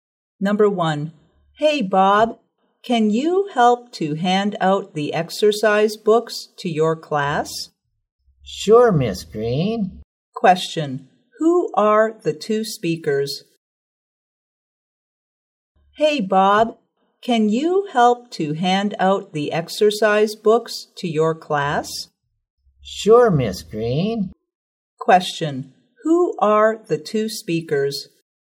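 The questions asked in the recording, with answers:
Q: who are the two speakers?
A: A teacher (Miss Green) and a student (Bob)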